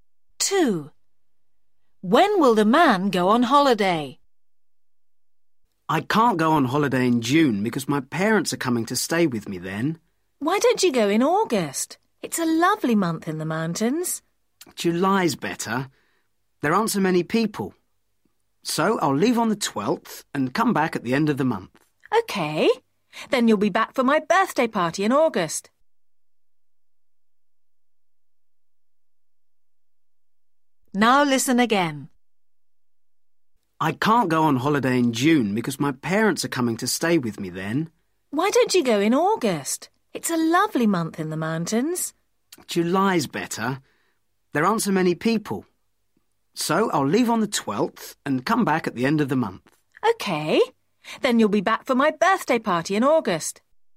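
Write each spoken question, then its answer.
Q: When will the man go on holiday?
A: July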